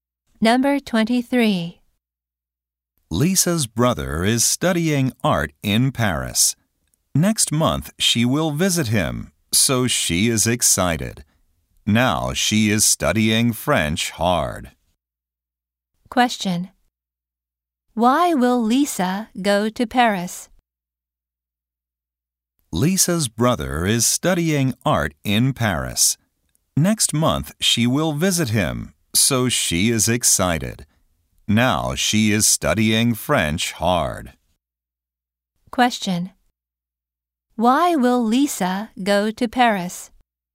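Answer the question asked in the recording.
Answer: To visit her brother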